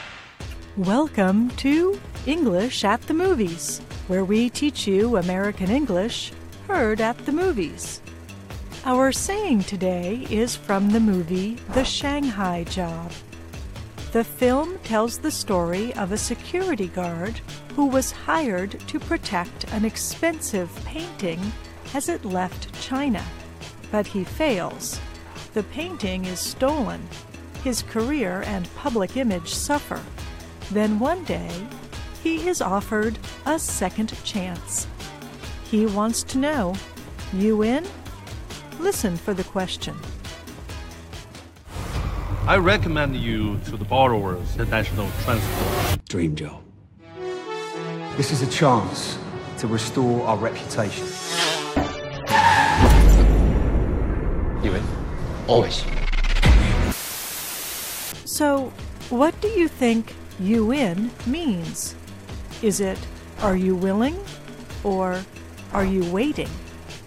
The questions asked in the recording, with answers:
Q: So, what do you think you in means? Is it, are you willing? Or, are you waiting?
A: You in is a short way of asking, are you willing?